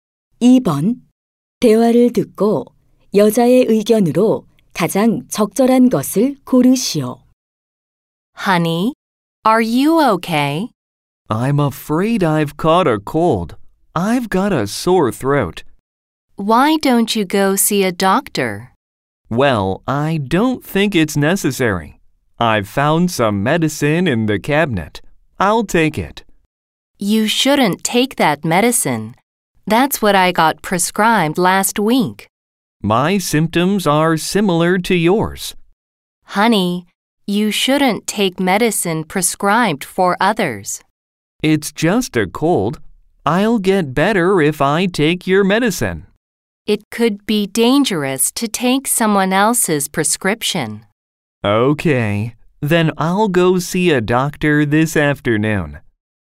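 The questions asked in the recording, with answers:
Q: 대화를 듣고 여자의 의견으로 가장 적절한 것을 고르시오.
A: 다른 사람에게 처방된 약을 복용하면 안 된다.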